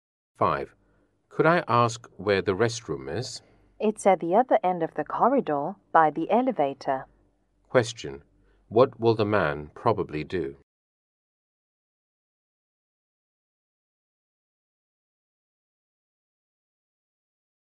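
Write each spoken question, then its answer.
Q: What will the man probably do?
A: Go to the restroom at the other end of the corridor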